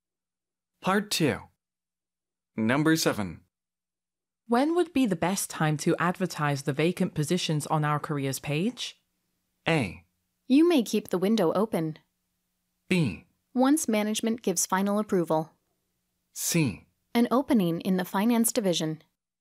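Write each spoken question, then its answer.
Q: When would be the best time to advertise the vacant positions on our careers page?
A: B: Once management gives final approval.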